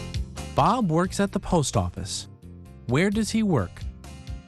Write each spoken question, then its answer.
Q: Where does he work?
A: He works at the post office.